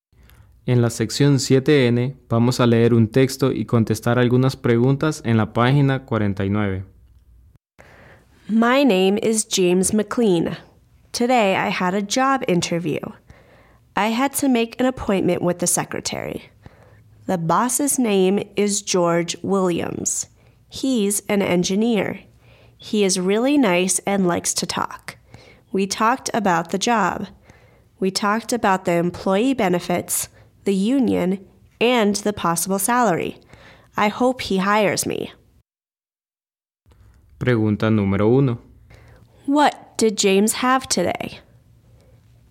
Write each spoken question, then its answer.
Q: What did James have today?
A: James had a job interview.